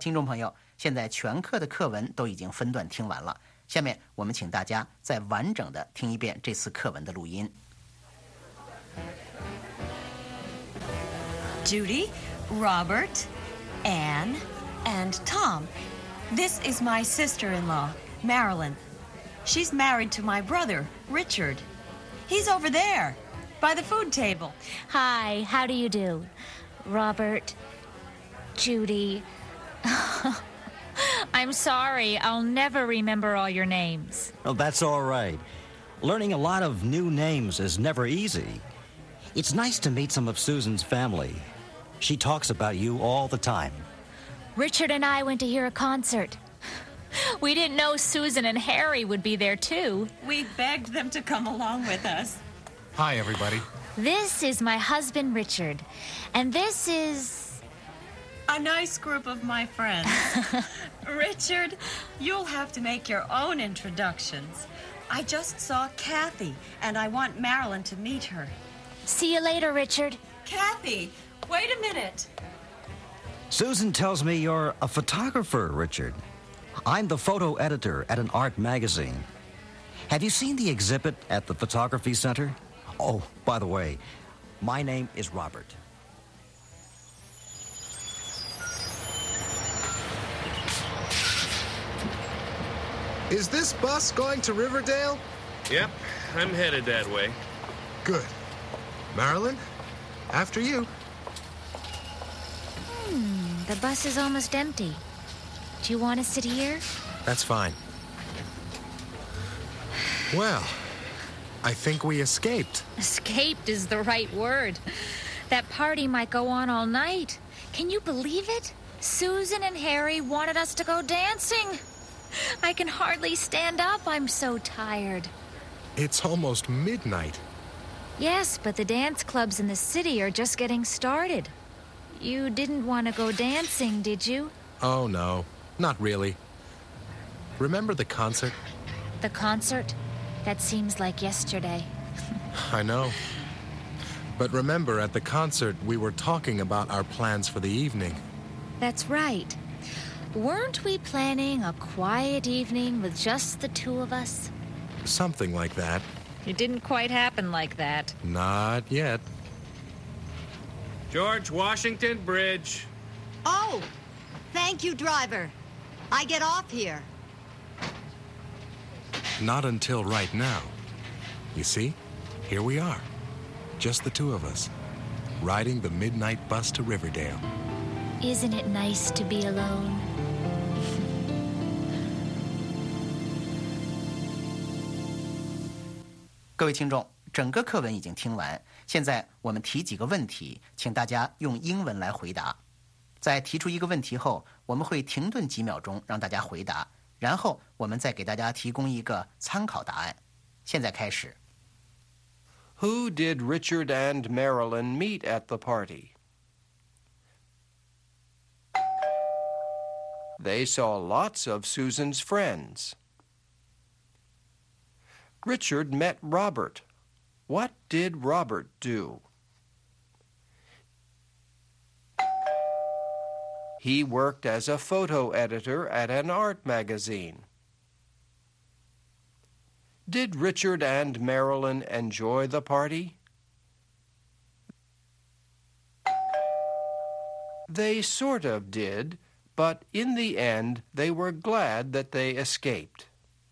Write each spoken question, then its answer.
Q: Who did Richard and Marilyn meet at the party?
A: They saw lots of Susan's friends.

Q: What did Robert do?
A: He worked as a photo editor at an art magazine.